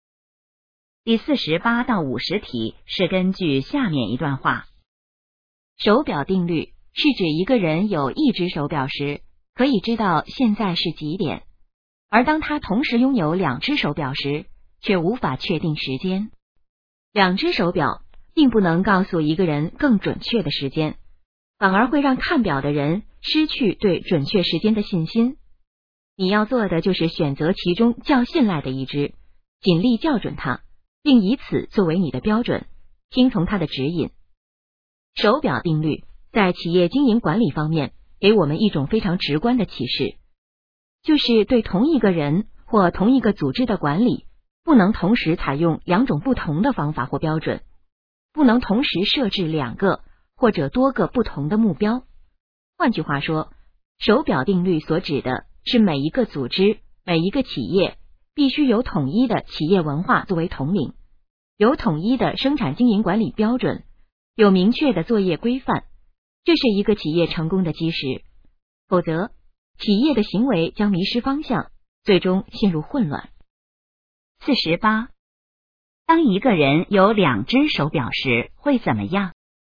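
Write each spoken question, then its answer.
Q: 当一个人有两只手表时会怎么样?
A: 无法确定时间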